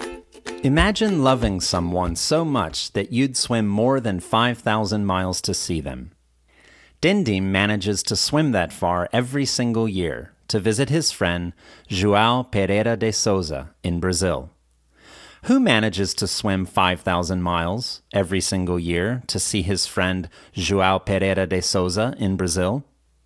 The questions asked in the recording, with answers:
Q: Who manages to swim 5,000 miles every single year to see his friend João Pereira de Souza in Brazil?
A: Dindim manages to swim that far every single year to visit his friend João Pereira de Souza in Brazil.